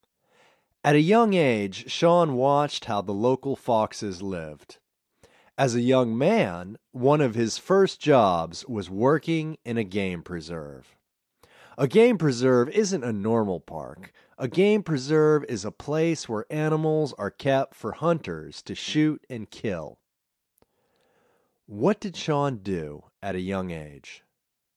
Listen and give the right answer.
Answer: At a young age, Sean watched how the local foxes lived.